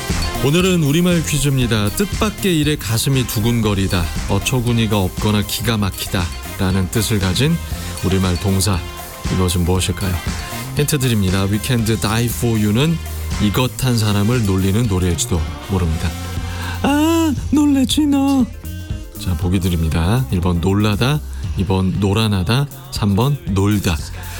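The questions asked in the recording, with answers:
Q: 뜻밖의 일에 가슴이 두근거리다, 어처구니가 없거나 기가 막히다 라는 뜻을 가진 우리말 동사, 이것은 무엇일까요?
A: 1: 놀라다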